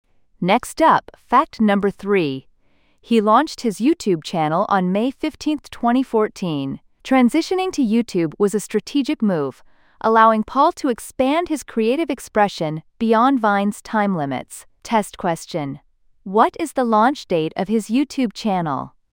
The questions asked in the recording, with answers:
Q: what is the launch date of his YouTube channel?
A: May 15, 2014.